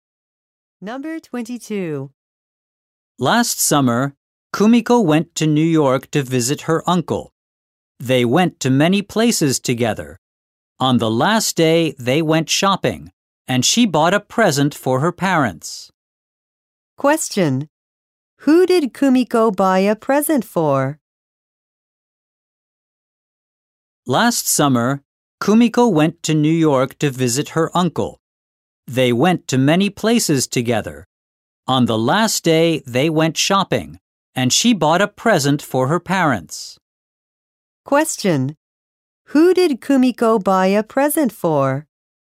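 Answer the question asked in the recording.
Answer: Her parents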